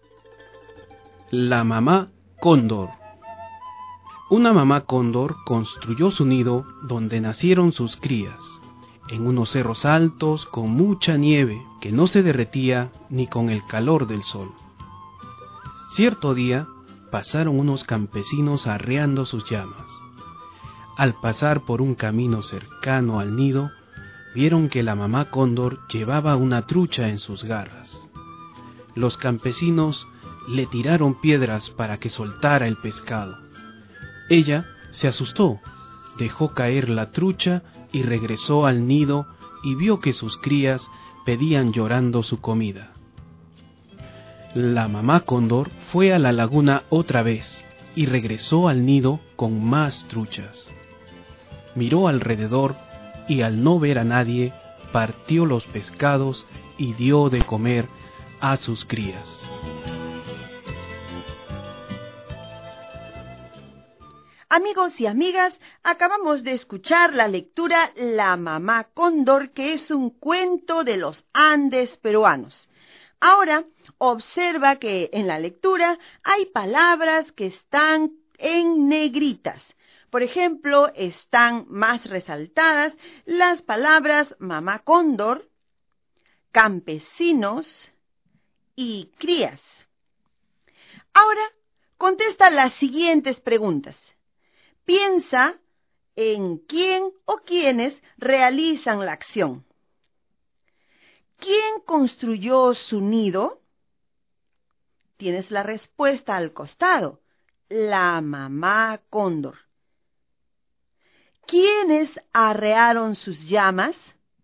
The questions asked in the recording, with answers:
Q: ¿Quiénes arrearon sus llamas?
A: Muy bien. Efectivamente, los campesinos.